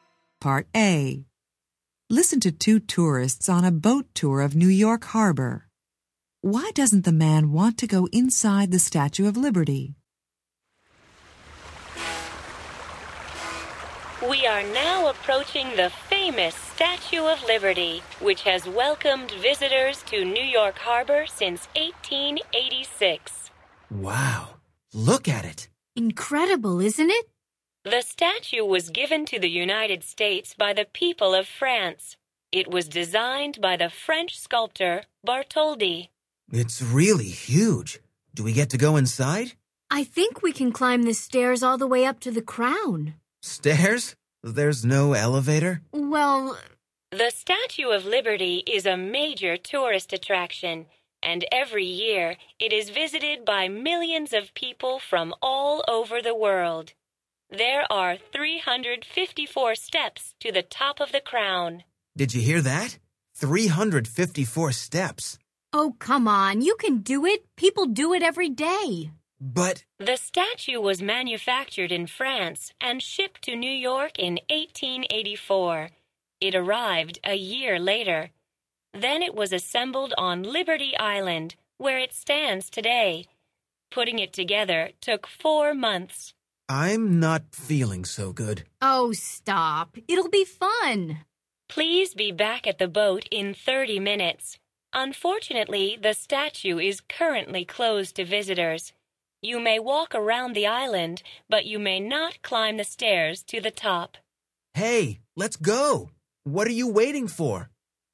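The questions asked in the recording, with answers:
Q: Why doesn't the man want to go inside the Statue of Liberty?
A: He doesn't want to climb the 354 stairs (there's no elevator).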